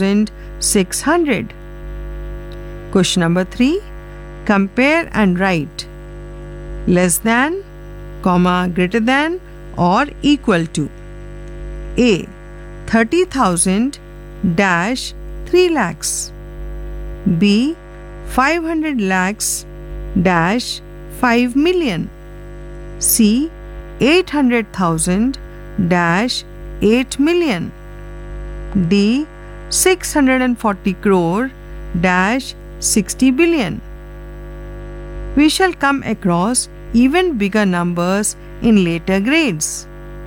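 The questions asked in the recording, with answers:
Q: 30,000-3 lakhs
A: 30,000 < 3 lakhs

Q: 500 lakhs-5 million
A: 500 lakhs > 5 million

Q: 800,000-8 million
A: 800,000 < 8 million

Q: 640 crore-60 billion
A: 640 crore < 60 billion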